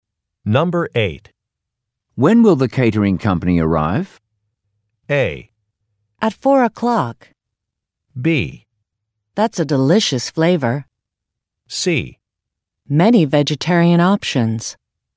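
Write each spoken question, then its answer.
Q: When will the catering company arrive?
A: A: At 4 o'clock.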